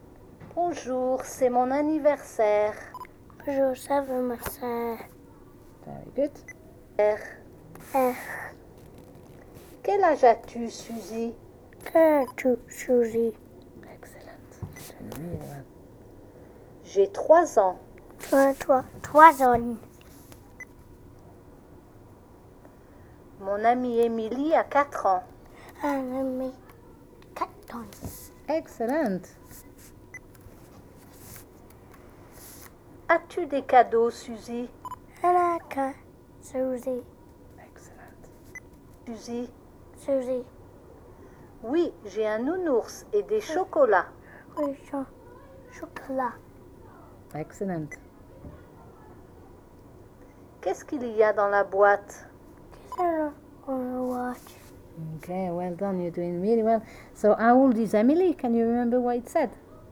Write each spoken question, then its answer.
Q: So, how old is Emily?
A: mon amie Emilie a 4 ans.